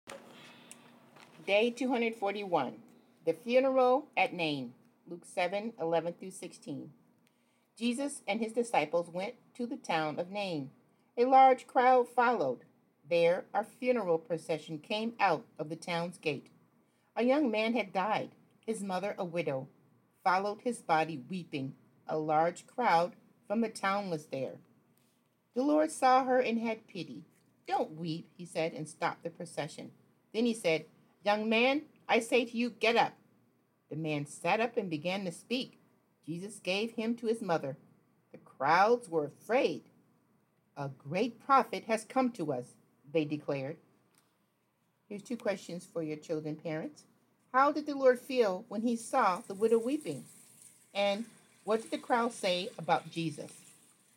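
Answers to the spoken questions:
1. He had pity on her
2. A great prophet has come to us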